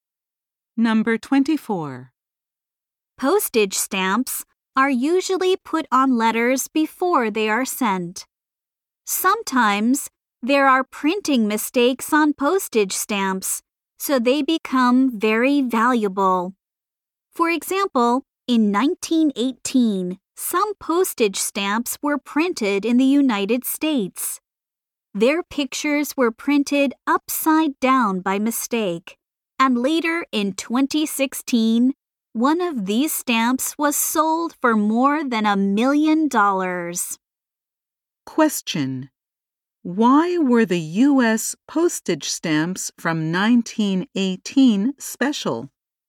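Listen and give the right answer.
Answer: Their pictures were printed upside down by mistake.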